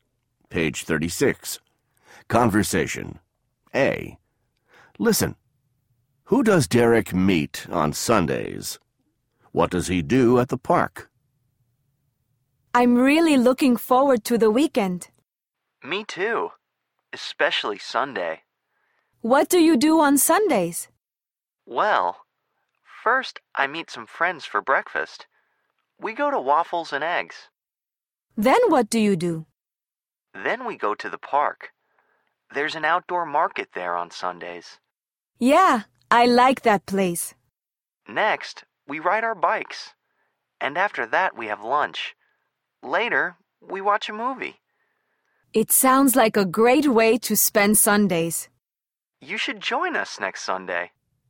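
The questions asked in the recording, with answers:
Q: Who does Derek meet on Sundays?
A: Some friends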